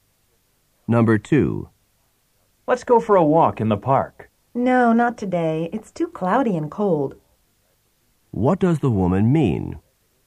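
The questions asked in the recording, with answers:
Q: What does the woman mean?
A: She doesn't want to walk because the weather is bad.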